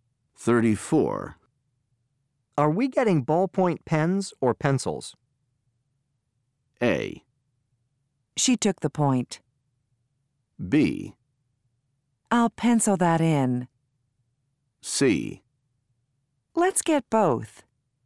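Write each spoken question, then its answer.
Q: Are we getting ballpoint pens or pencils?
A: C: Let's get both.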